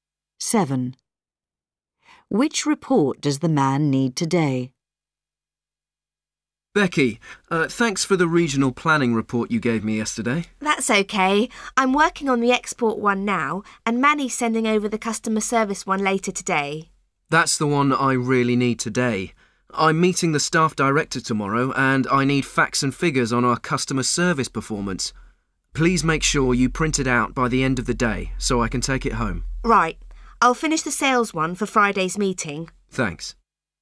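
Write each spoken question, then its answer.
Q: Which report does the man need today?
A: The customer service report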